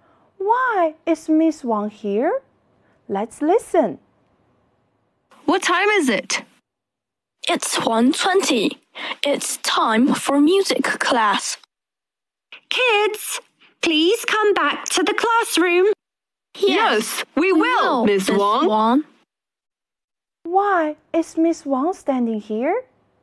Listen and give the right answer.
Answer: It's 1:20. It's time for music class.